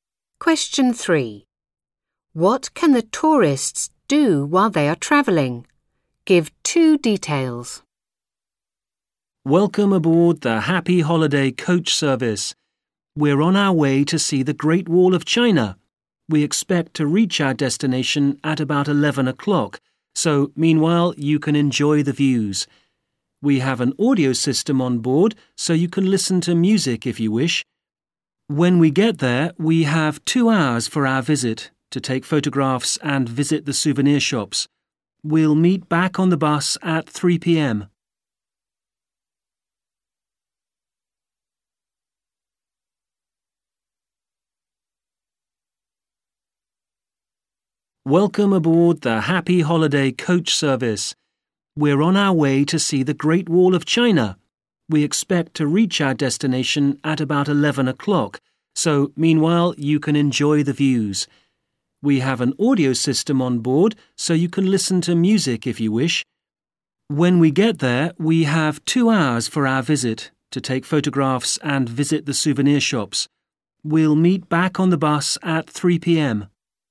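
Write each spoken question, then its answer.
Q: What can the tourists do while they are travelling?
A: Enjoy the views and listen to music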